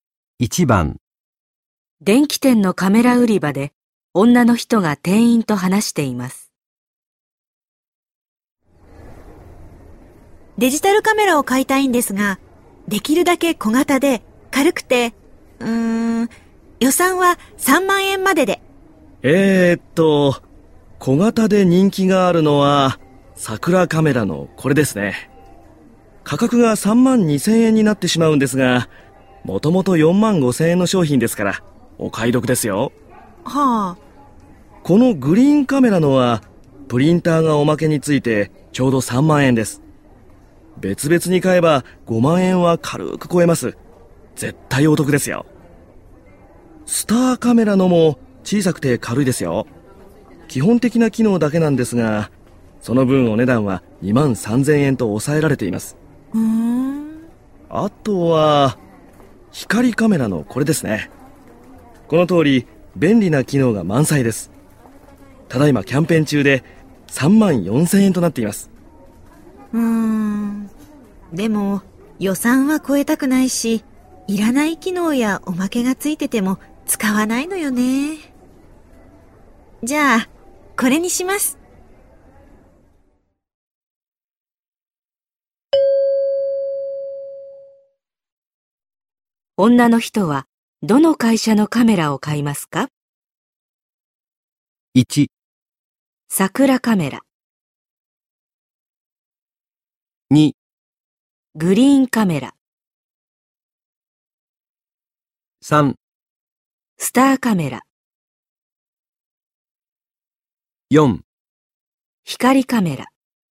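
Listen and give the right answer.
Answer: 3: スターカメラ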